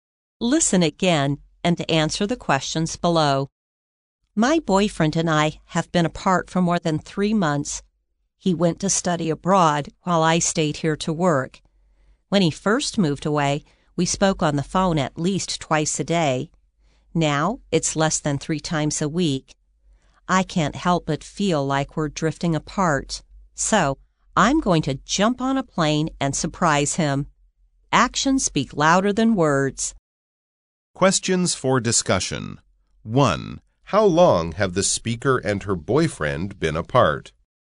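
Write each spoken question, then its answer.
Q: How long have the speaker and her boyfriend been apart?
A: More than 3 months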